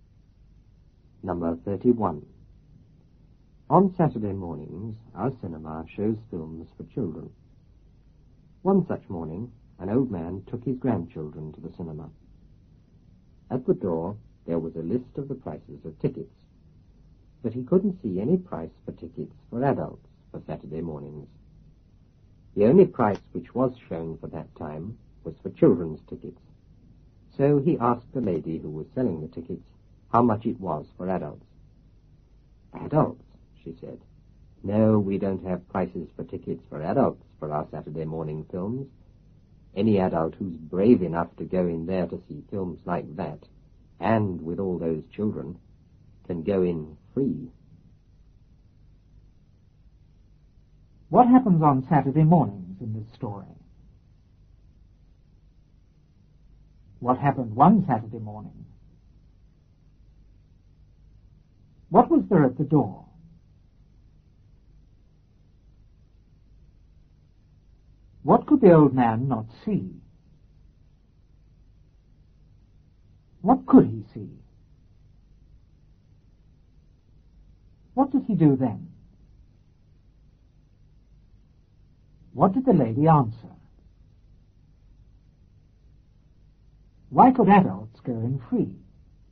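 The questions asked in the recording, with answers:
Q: What happens on Saturday mornings in this story?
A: The cinema shows films for children.

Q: What happened one Saturday morning?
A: An old man took his grandchildren to the cinema.

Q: What was there at the door?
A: A list of the prices of tickets.

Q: What could the old man not see?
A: Any price for adult tickets for Saturday mornings.

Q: What could he see?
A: Only the price for children's tickets.

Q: What did he do then?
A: He asked the ticket lady how much it was for adults.

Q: What did the lady answer?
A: They had no adult prices; adults brave enough could go in free.

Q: Why could adults go in free?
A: Because any adult brave enough to watch those films with all those children deserved to go in free.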